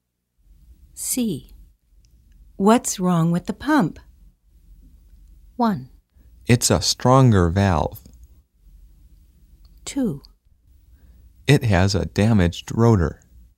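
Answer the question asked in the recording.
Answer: 2: It has a damaged rotor.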